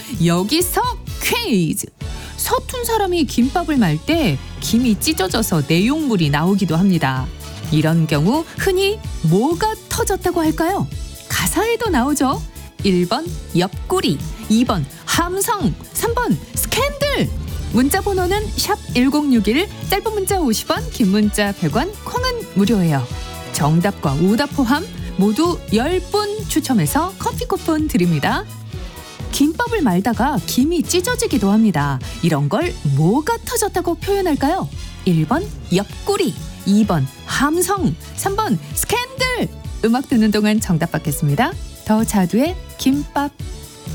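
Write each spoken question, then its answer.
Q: 이런 경우 흔히 뭐가 터졌다고 할까요?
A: 1: 옆구리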